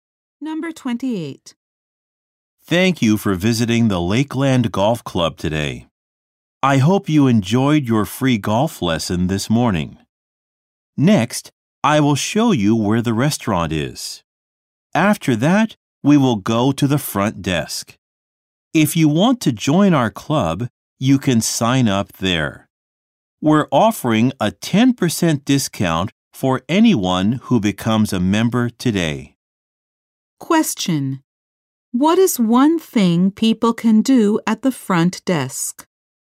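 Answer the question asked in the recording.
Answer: Sign up to join the club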